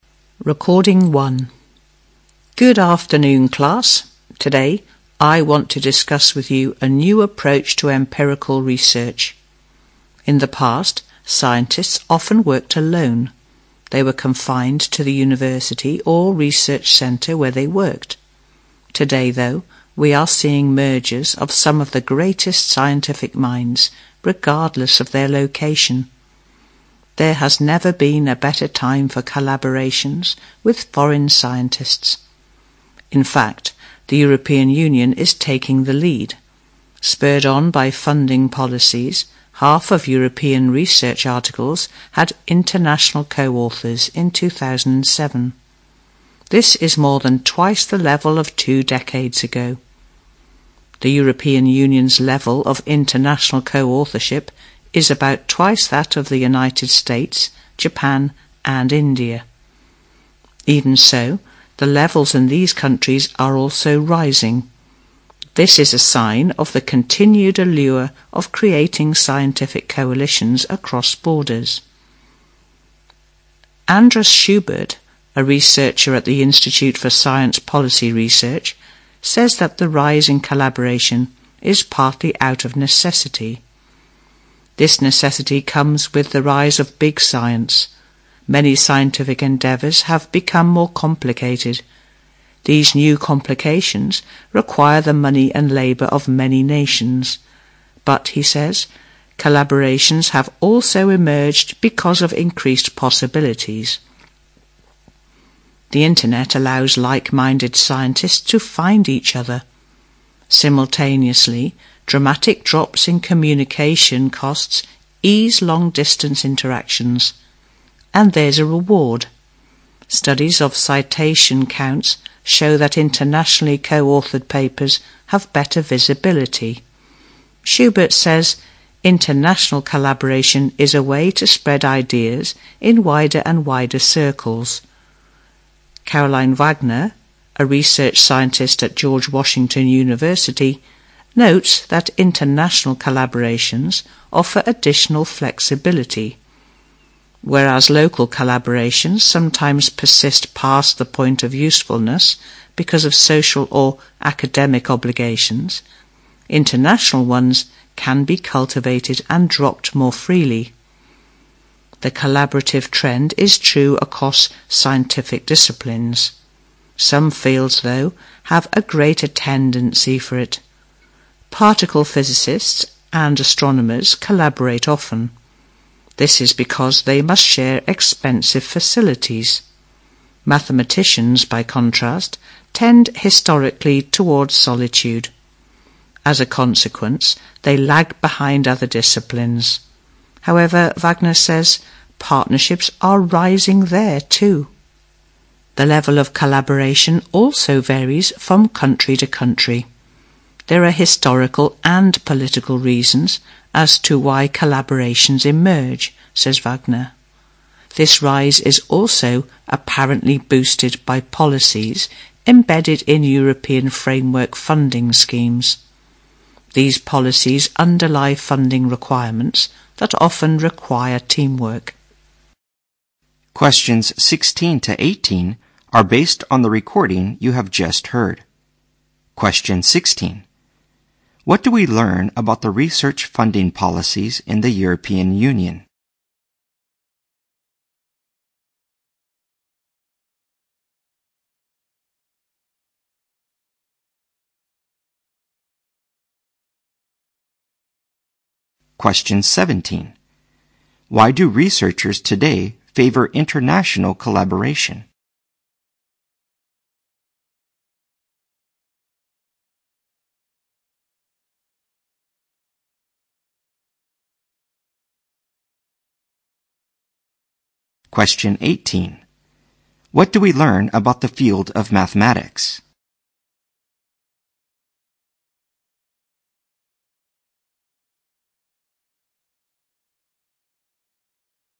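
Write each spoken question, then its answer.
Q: What do we learn about the research funding policies in the European Union?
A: They often require teamwork, boosting international collaboration

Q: What do we learn about the field of mathematics?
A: It lags behind other fields in collaboration, though partnerships are rising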